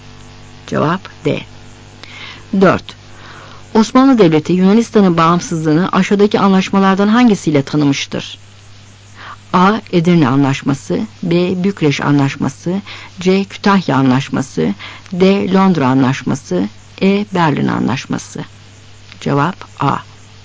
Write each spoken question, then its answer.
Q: Osmanlı Devleti Yunanistan'ın bağımsızlığını aşağıdaki anlaşmalardan hangisiyle tanımıştır?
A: Cevap A.